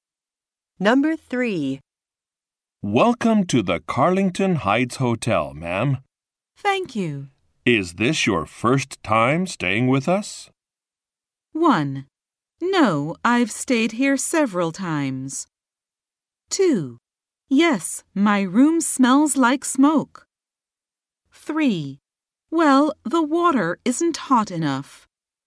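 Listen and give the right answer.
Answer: 1: No, I've stayed here several times.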